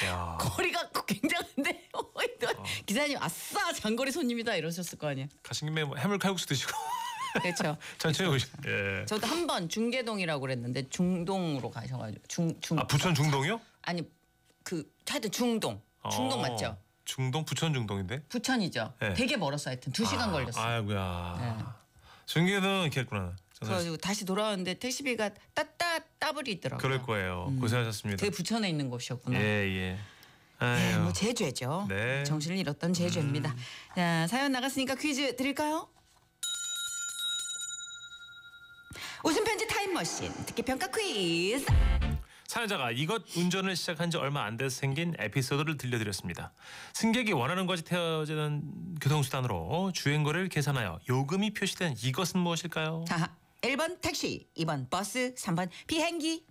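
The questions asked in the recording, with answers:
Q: 승객이 원하는 것이 태워지는 교통수단으로 주행거리를 계산하여 요금이 표시된 이것은 무엇일까요?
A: 1번: 택시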